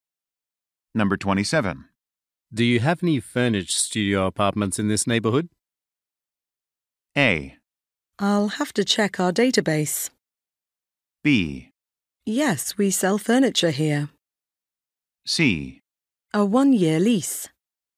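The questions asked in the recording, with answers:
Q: Do you have any furnished studio apartments in this neighborhood?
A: A: I'll have to check our database.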